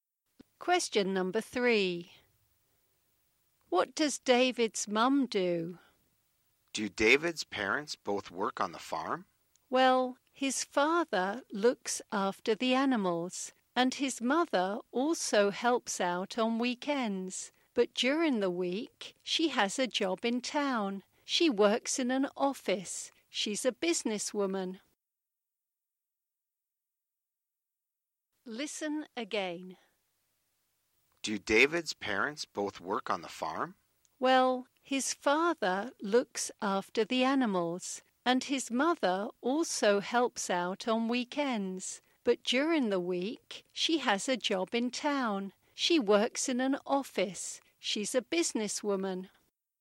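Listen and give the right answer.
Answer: She works in an office; she's a businesswoman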